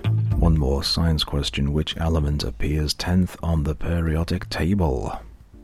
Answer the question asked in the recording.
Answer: answer is neon.